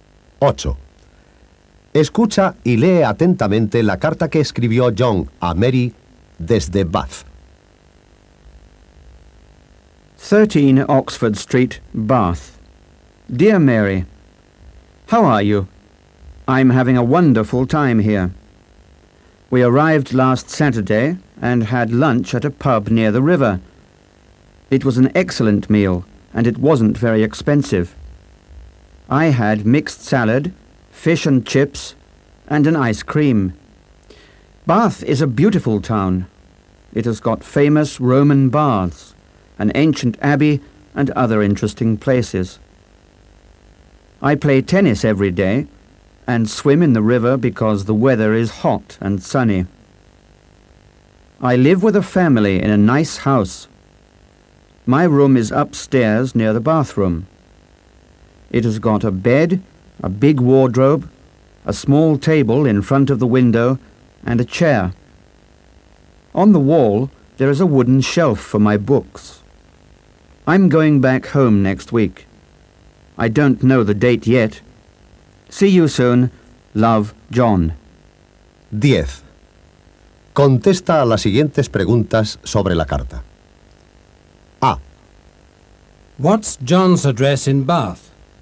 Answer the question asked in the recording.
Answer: John's address is 13 Oxford Street.